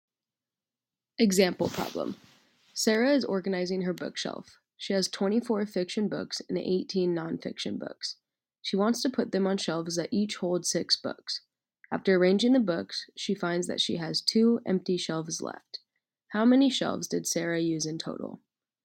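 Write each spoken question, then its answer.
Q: How many shelves did Sarah use in total?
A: 7 shelves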